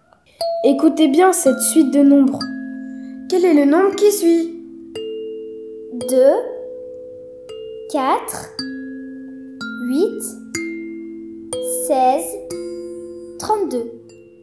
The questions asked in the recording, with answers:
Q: Quel est le nombre qui suit ?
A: La réponse est 64.